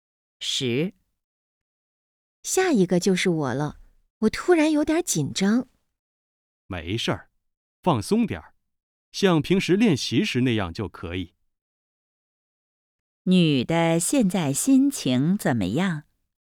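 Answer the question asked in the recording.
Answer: 紧张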